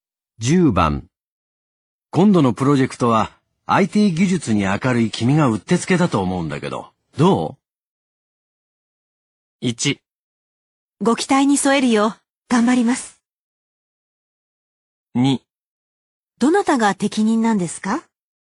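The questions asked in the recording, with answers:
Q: 今度のプロジェクトは IT 技術に明るい君がうってつけだと思うんだけど、ど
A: 1: ご期待に添えるよう、頑張ります。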